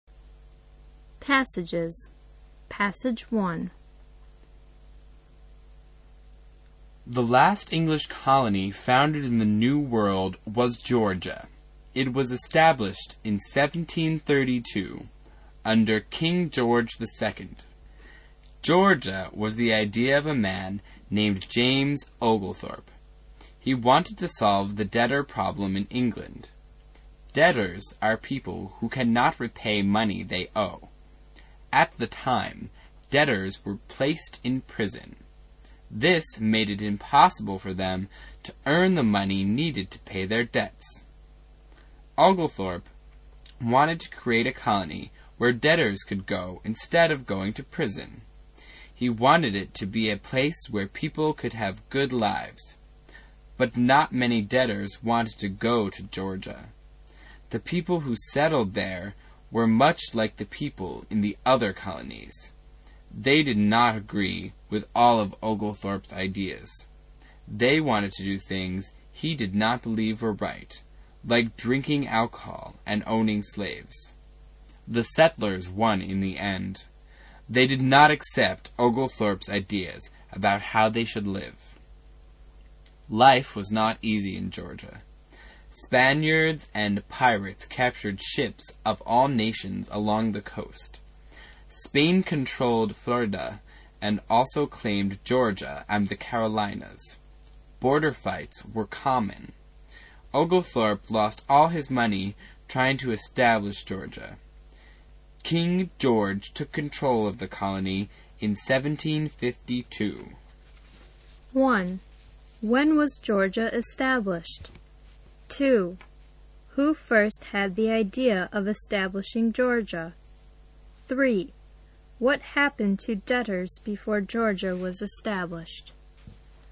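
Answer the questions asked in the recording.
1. In 1732
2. James Oglethorpe
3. They were placed in prison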